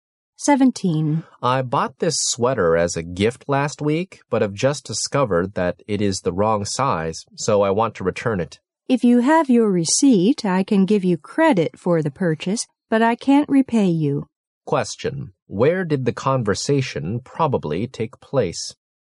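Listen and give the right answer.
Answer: In a store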